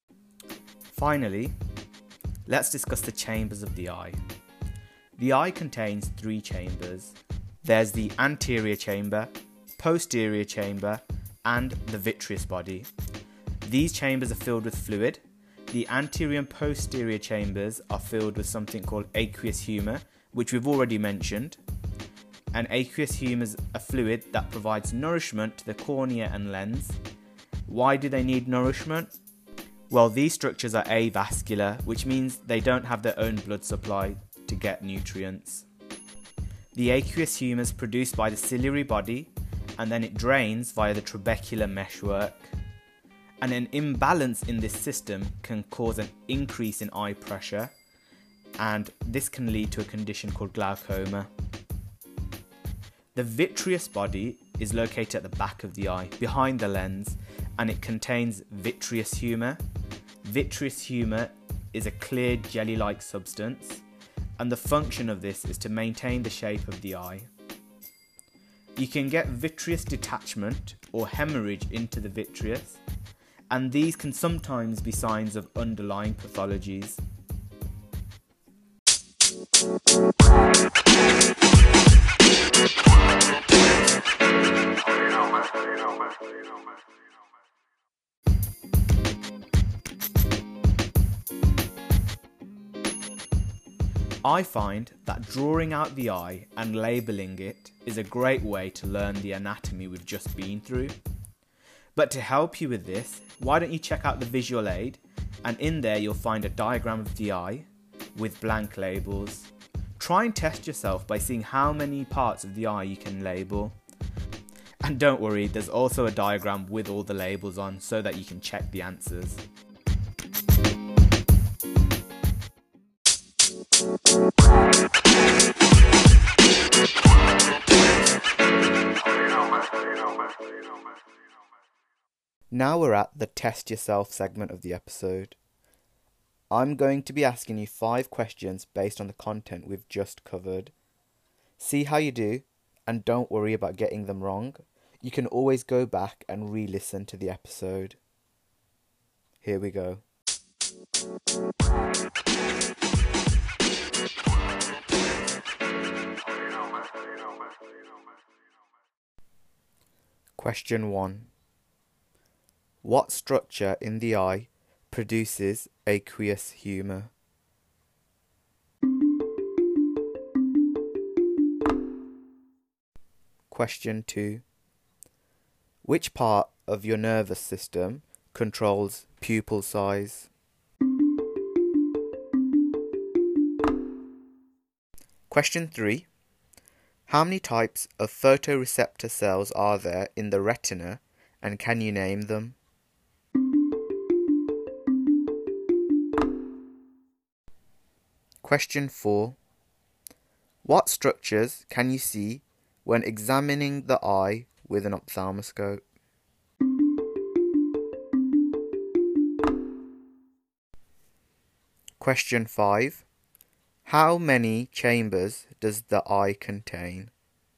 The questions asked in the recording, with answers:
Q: What structure in the eye produces aqueous humour?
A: That would be the ciliary body.

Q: How many chambers does the eye contain?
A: The eye has 3 chambers, the anterior, posterior, and also the vitreous body.